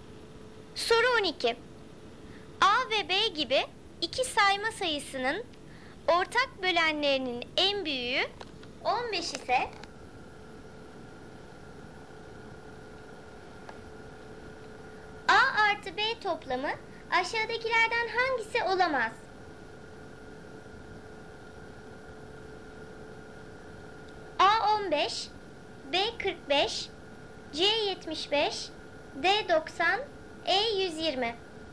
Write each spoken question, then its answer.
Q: A artı B toplamı aşağıdakilerden hangisi olamaz?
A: Doğru cevap A 15.